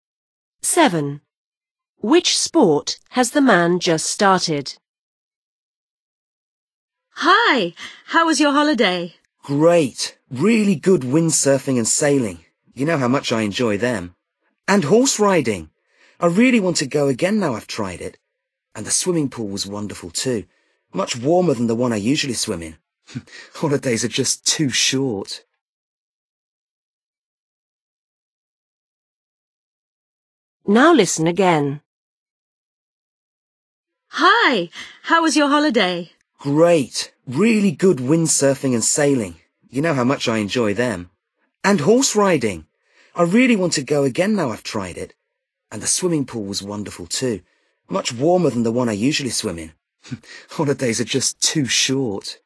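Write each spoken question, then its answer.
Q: Which sport has the man just started?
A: horse riding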